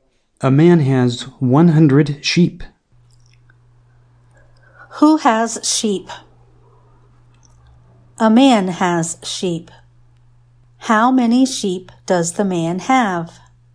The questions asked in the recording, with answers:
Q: How many sheep does the man have?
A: The man has 100 sheep.